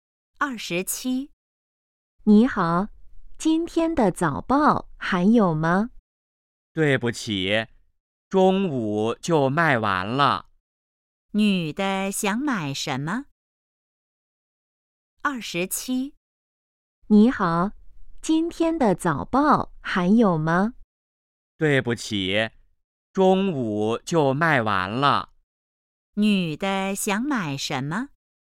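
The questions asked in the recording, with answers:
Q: 女的想买什么?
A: 今天的早报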